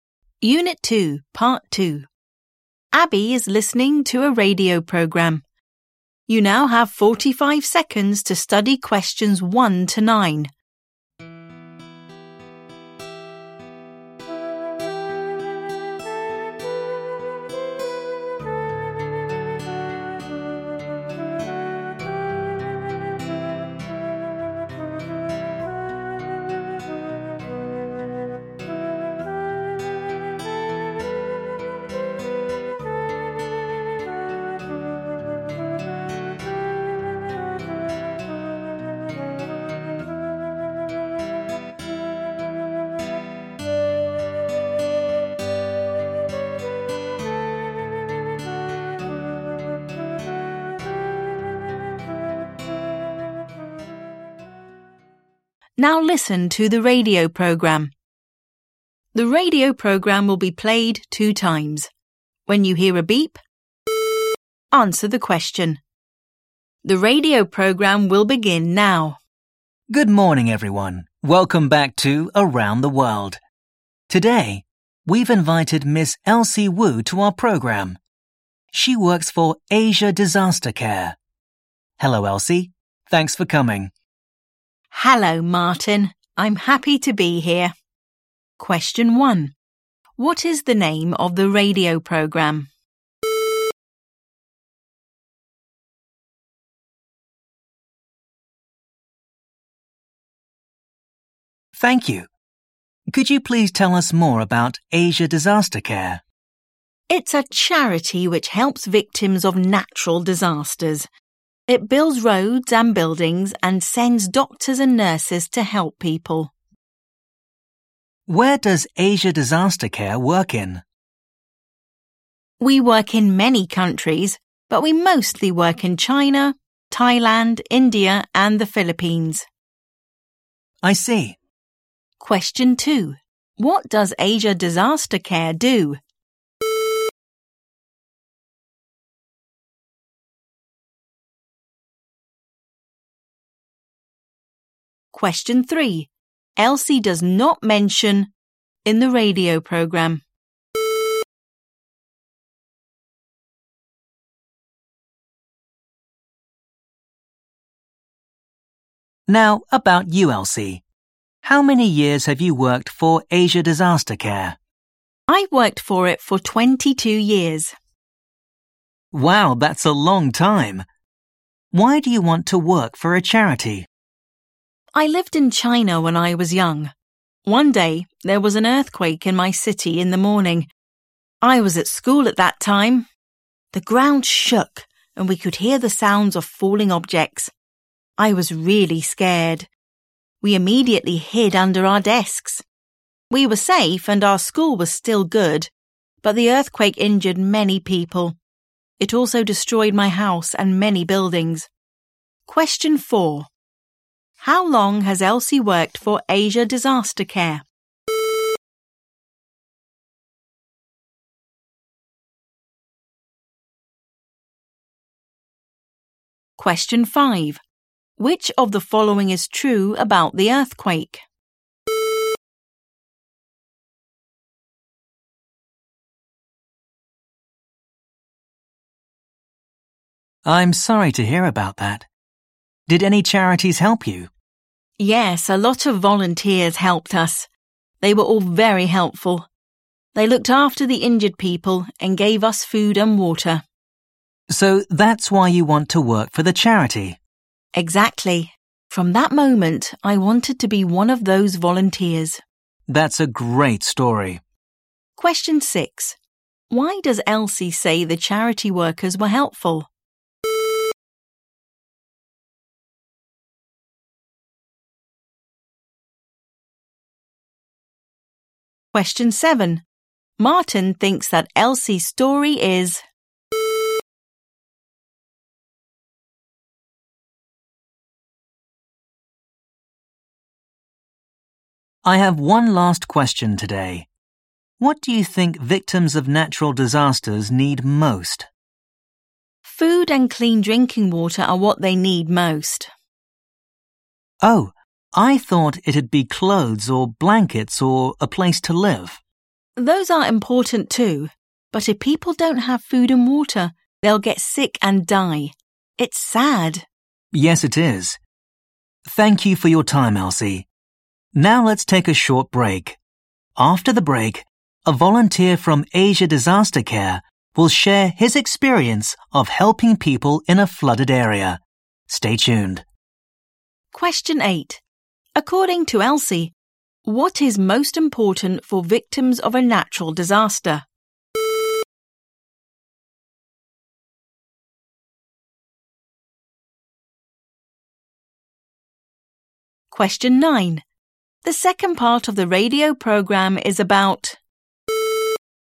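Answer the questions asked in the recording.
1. Around the World
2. It helps victims of natural disasters by building roads and buildings and sending doctors and nurses
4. 22 years
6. They looked after the injured people and gave them food and water
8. Food and clean drinking water
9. a volunteer's experience of helping people in a flooded area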